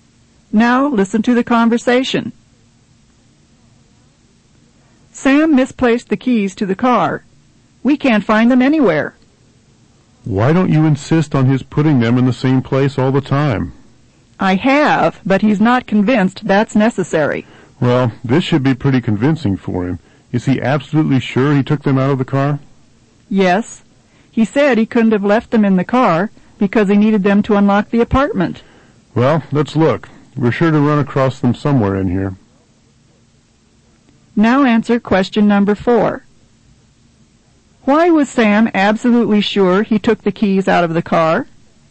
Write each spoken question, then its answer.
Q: Why was Sam absolutely sure he took the keys out of the car?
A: he couldn't have left them in the car because he needed them to unlock the apartment.